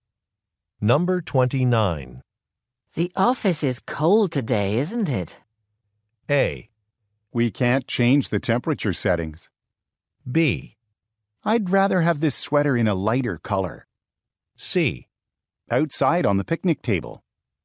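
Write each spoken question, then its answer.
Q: The office is cold today, isn't it?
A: A: We can't change the temperature settings.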